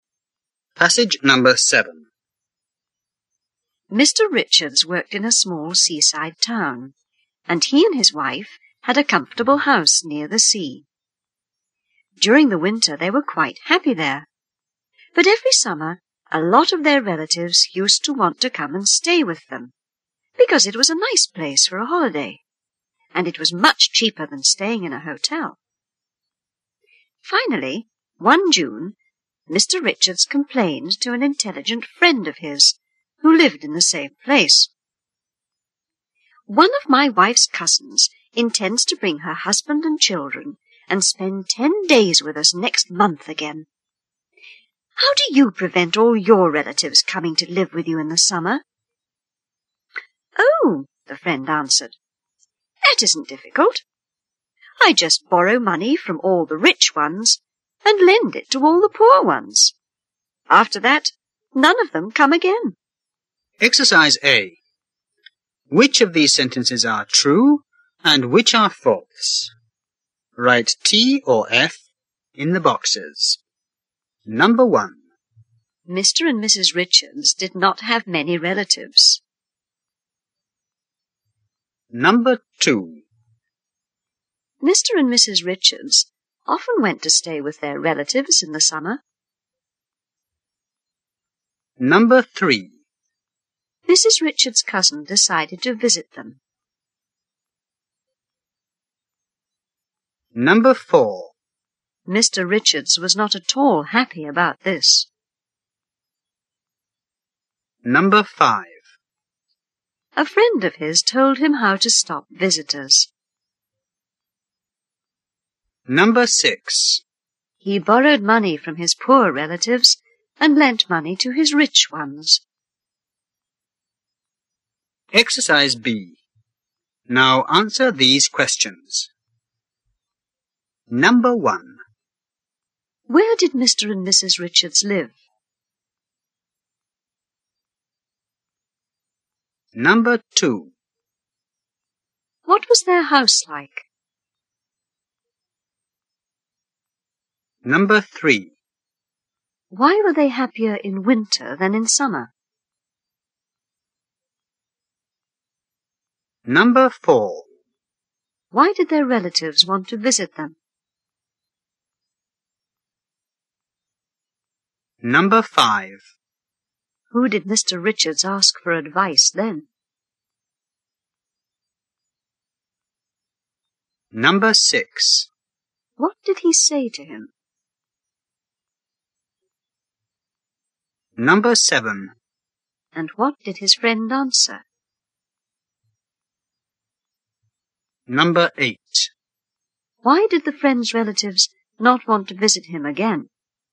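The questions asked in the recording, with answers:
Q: Where did Mr. and Mrs. Richards live?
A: In a small seaside town, near the sea

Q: What was their house like?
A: Comfortable, near the sea

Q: Why were they happier in winter than in summer?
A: Because many relatives came to stay in summer

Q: Why did their relatives want to visit them?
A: It was a nice holiday place and cheaper than a hotel

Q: Who did Mr. Richards ask for advice then?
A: An intelligent friend who lived in the same place

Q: What did he say to him?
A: His wife's cousin's family wanted to stay 10 days; he asked how to stop relatives coming

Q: And what did his friend answer?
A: He borrows money from rich relatives and lends it to poor ones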